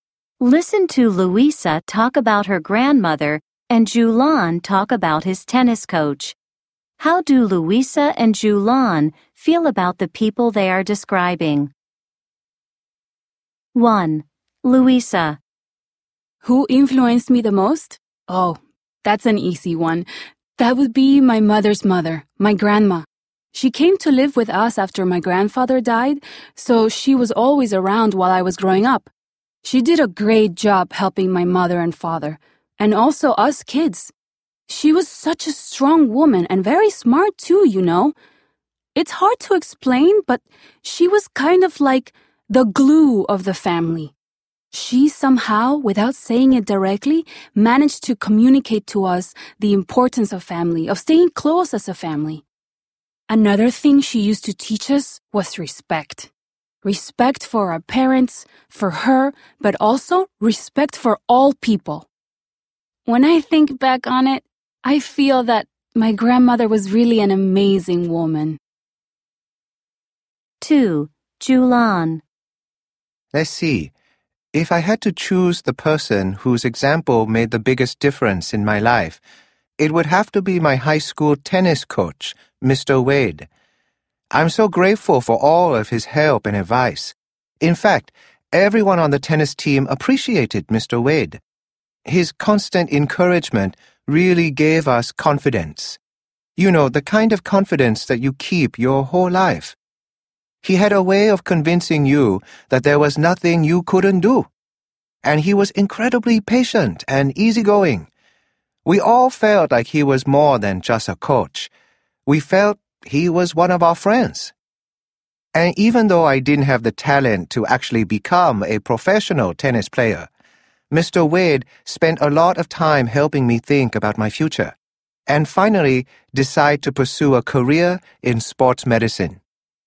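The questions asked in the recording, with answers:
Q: How do Luisa and Julian feel about the people they are describing?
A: Luisa thinks her grandmother was an amazing woman

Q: How do Luisa and Julian feel about the people they are describing?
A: Julian is grateful to his coach Mr. Wade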